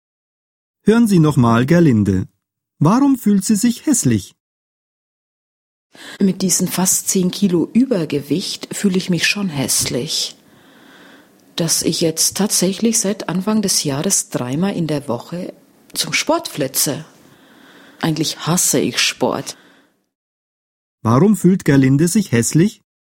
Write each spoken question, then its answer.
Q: Warum fühlt Gerlinde sich hässlich?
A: Weil sie Übergewicht hat.